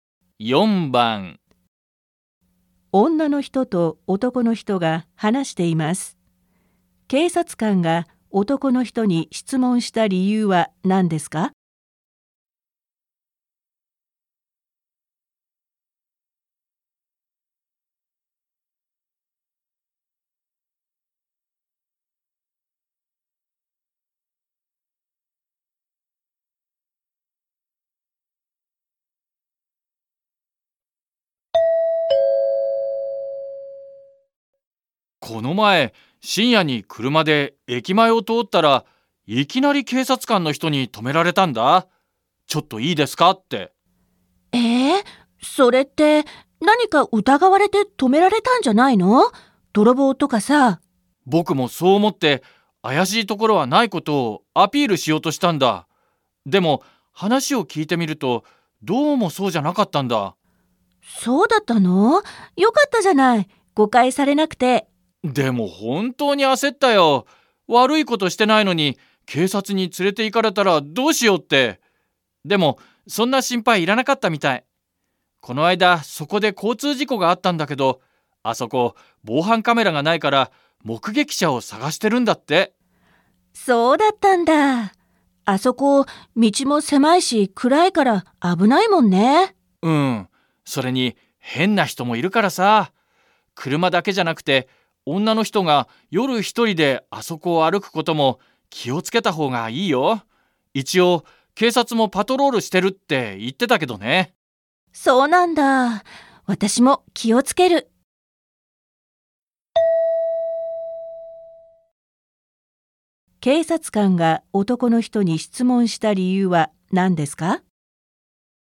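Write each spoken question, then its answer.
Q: 警察官が男の人に質問した理由は何ですか?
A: 交通事故の目撃者を探していたから

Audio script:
女の人と男の人が話しています。警察官が男の人に質問した理由は何ですか。
M この前、深夜に車で駅前を通ったら、いきなり警察官の人に止められたんだ。ちょっといいですかって。
F え、それって、何か疑われて止められたんじゃないの?泥棒とかさ。
M 僕もそう思って怪しいところはないことをアピールしようとしたんだ。でも、話を聞いてみると、どうもそうじゃなかったんだ。
F そうだったの。よかったじゃない。誤解されなくて。/ Thế à. May thế còn gì. Vì không bị hiểu nhầm.
M でも、本当に焦ったよ。悪いことしてないのに警察に連れて行かれたらどうしようって。でも、そんな心配いらなかったみたい。この間そこで交通事故があったんだけど、あそこ防犯カメラがないから目撃者を捜してるんだって。
あそこ、道も狭いし暗いから危ないもんね。
M うん。それに、変な人もいるからさ。車だけじゃなくて女の人が夜一人であそこを歩くことも気を付けた方がいいよ。一応、警察もパトロールしてるって言ってたけどね。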